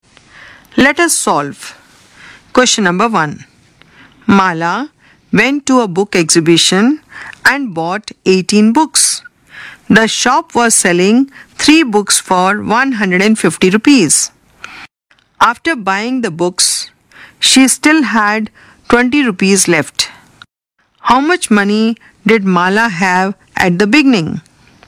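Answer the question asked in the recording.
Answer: 920 rupees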